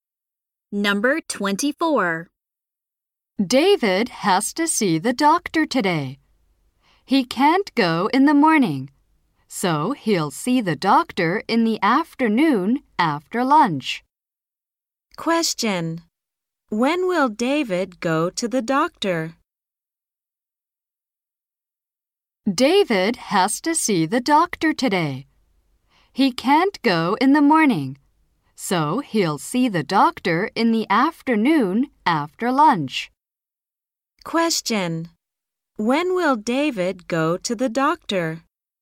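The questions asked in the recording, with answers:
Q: When will David go to the doctor?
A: In the afternoon after lunch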